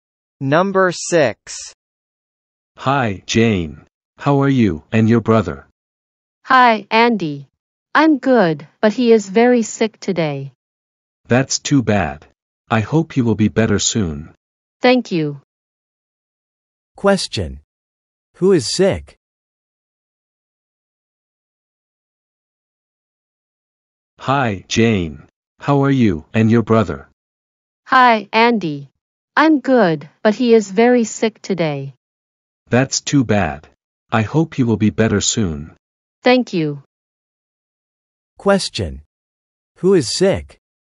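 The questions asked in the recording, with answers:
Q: Who is sick?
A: Jane's brother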